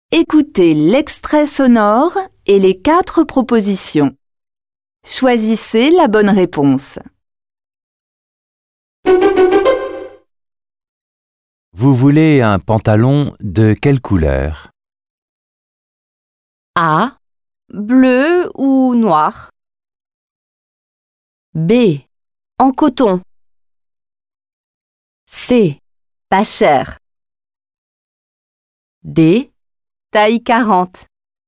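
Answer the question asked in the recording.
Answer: A: Bleu ou noir.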